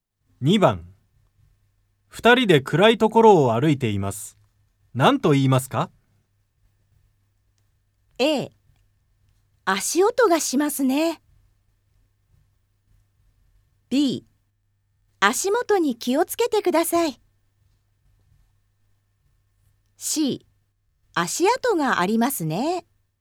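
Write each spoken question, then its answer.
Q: 2人で暗いところを歩いています。何と言いますか?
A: B: 足元に気をつけてください。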